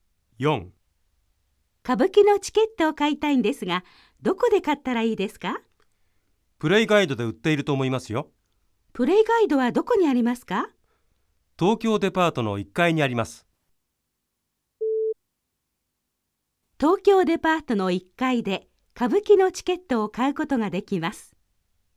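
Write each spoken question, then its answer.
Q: 東京デパートの1階で歌舞伎のチケットを買うことができます。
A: ○(正しい)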